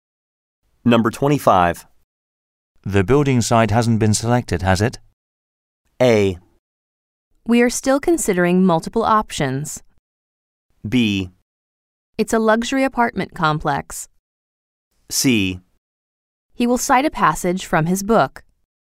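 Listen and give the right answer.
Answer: A: We are still considering multiple options.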